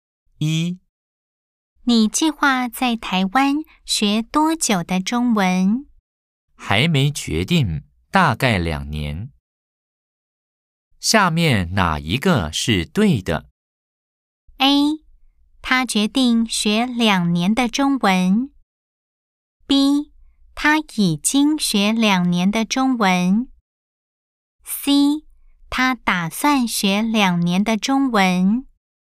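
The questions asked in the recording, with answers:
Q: 下面哪一个是对的?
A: C: 他打算学两年的中文。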